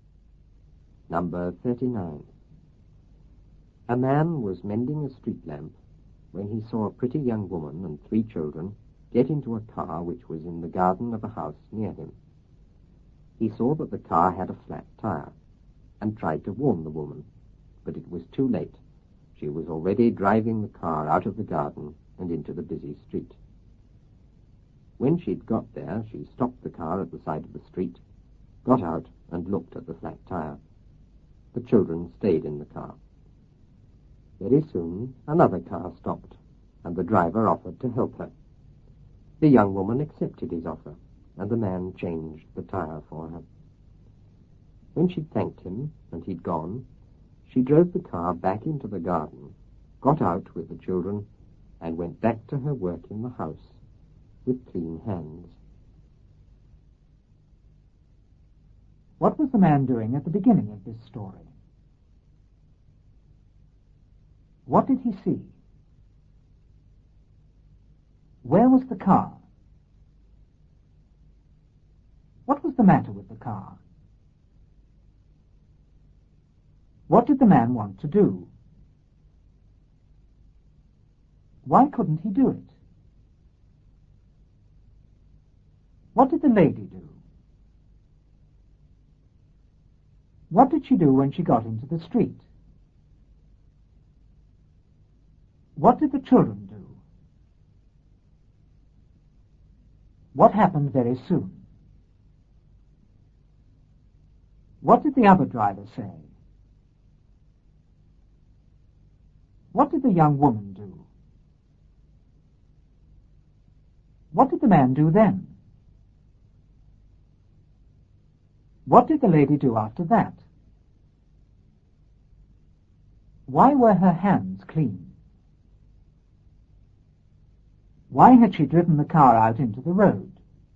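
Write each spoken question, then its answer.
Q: What was the man doing at the beginning of this story?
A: Mending a street lamp

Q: What did he see?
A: A pretty young woman and three children get into a car

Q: Where was the car?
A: In the garden of a house near him

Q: What was the matter with the car?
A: It had a flat tire

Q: What did the man want to do?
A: Warn the woman

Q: Why couldn't he do it?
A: It was too late; she was already driving out

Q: What did the lady do?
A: Drove the car out of the garden into the busy street

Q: What did she do when she got into the street?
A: Stopped at the side, got out and looked at the flat tire

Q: What did the children do?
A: Stayed in the car

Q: What happened very soon?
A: Another car stopped

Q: What did the other driver say?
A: He offered to help her

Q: What did the young woman do?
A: Accepted his offer

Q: What did the man do then?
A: Changed the tire for her

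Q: What did the lady do after that?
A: Thanked him, drove back into the garden and went back to work in the house

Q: Why were her hands clean?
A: Because the other driver changed the tire

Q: Why had she driven the car out into the road?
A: To get someone to change the tire for her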